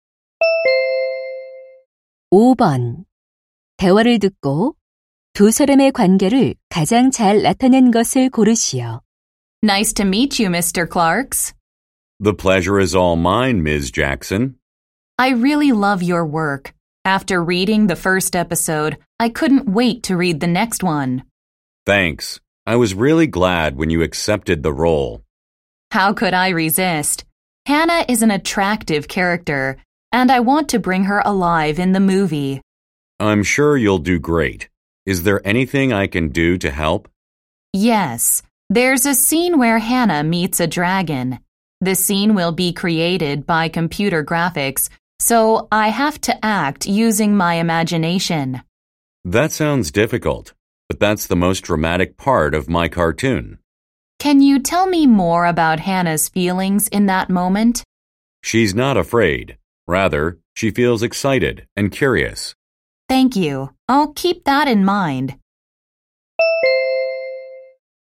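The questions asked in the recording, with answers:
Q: 대화를 듣고 두 사람의 관계를 가장 잘 나타낸 것을 고르시오.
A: 만화가 – 배우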